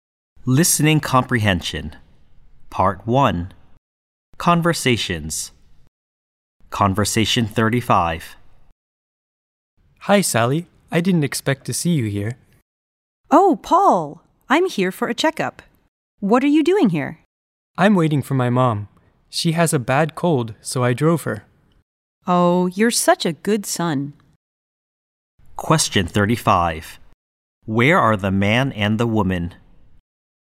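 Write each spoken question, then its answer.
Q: Where are the man and the woman?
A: At a hospital or doctor's clinic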